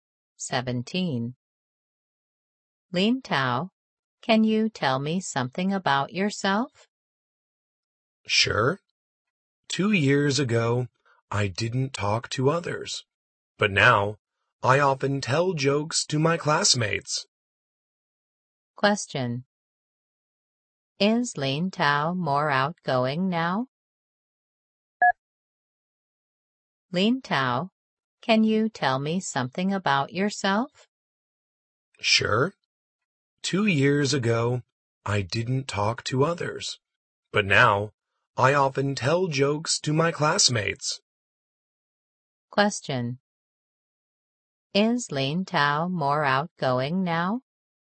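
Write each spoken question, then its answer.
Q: Is Lin Tao more outgoing now?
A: Yes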